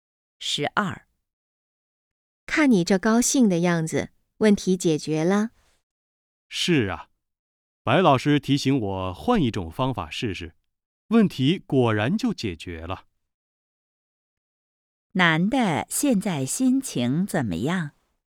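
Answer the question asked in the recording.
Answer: 很高兴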